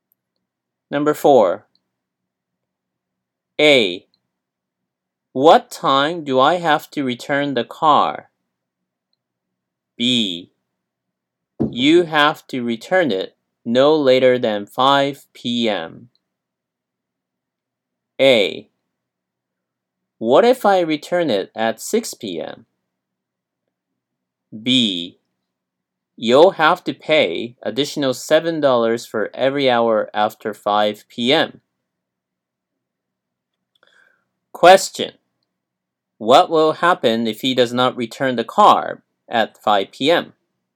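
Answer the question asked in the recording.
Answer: He will pay an additional $7 for every hour after 5 p.m.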